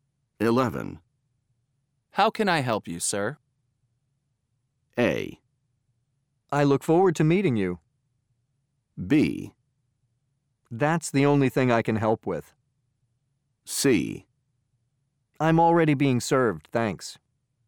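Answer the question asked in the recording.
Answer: C: I'm already being served, thanks.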